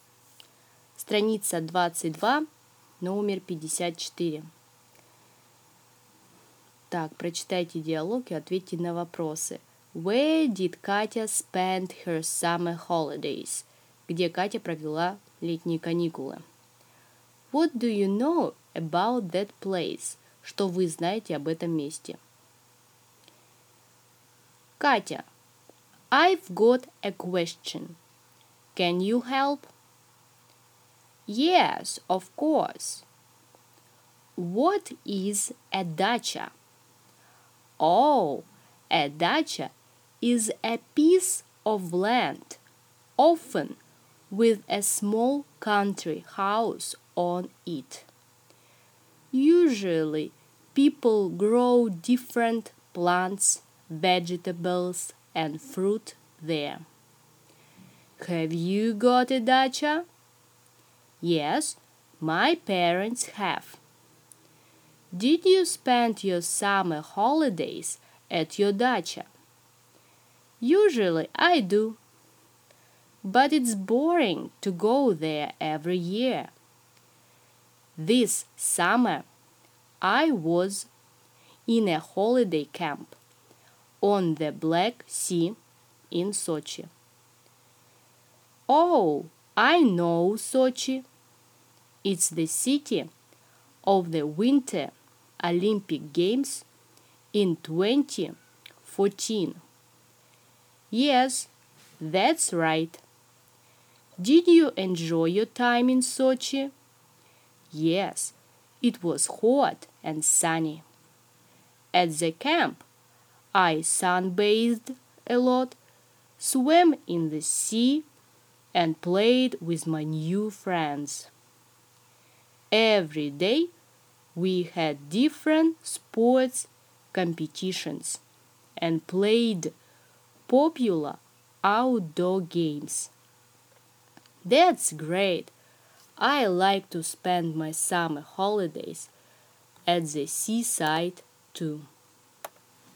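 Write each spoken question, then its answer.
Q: Where did Katya spend her summer holidays?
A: In a holiday camp on the Black Sea in Sochi

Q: What do you know about that place?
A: Sochi was the city of the 2014 Winter Olympic Games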